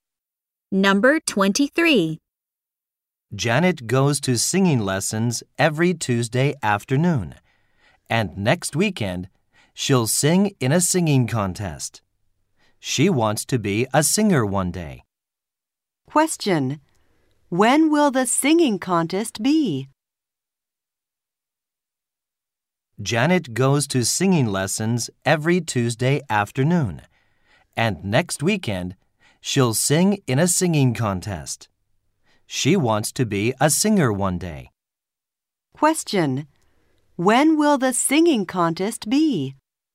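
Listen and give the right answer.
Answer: Next weekend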